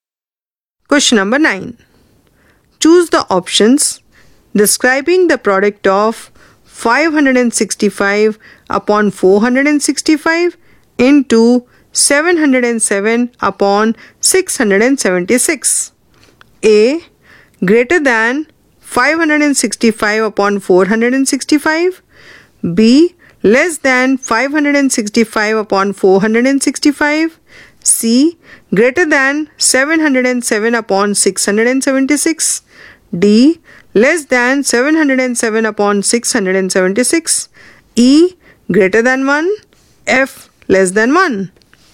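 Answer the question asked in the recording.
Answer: A: Greater than 565 upon 465; C: Greater than 707 upon 676; E: Greater than 1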